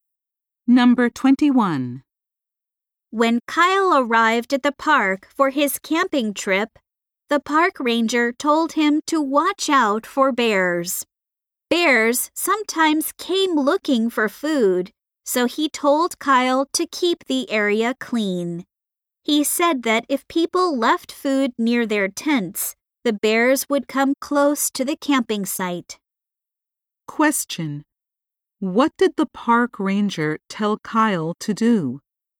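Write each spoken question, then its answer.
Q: What did the park ranger tell Kyle to do?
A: Keep the area clean.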